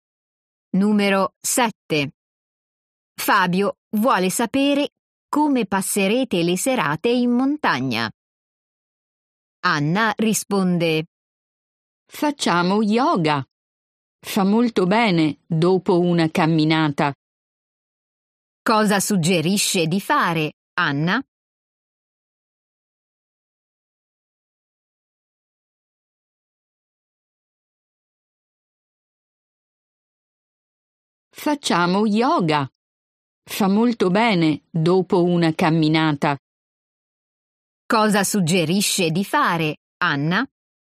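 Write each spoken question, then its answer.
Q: Cosa suggerisce di fare, Anna?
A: Yoga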